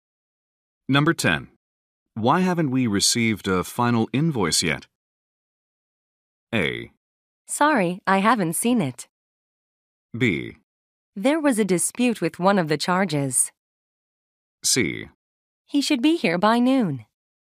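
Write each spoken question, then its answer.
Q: Why haven't we received a final invoice yet?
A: B: There was a dispute with one of the charges.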